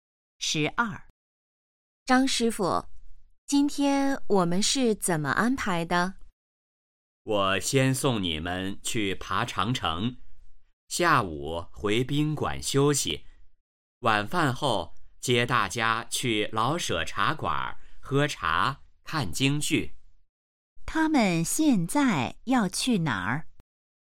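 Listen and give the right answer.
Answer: 去爬长城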